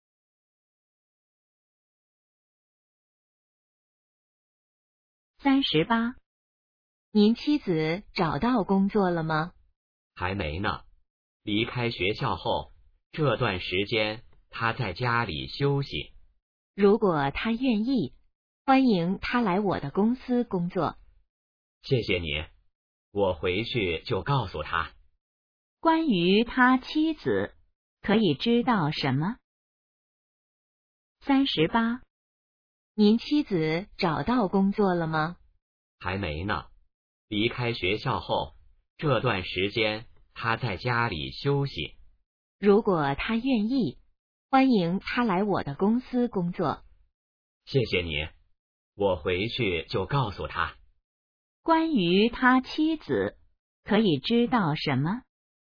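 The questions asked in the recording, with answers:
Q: 关于他妻子,可以知道什么?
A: 还没找到工作,在家休息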